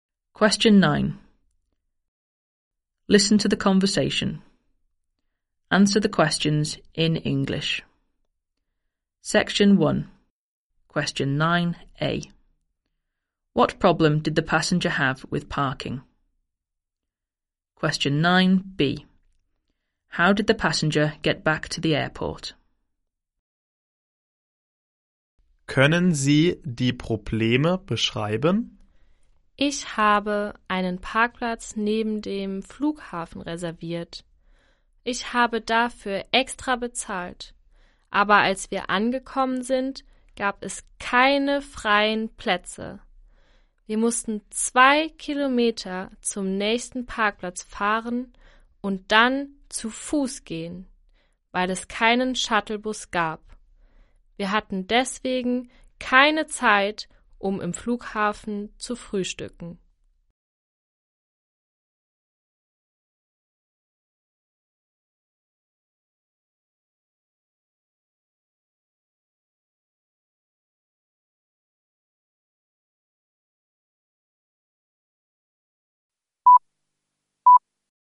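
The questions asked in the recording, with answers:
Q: What problem did the passenger have with parking?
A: There were no free spaces in the car park they had reserved and paid extra for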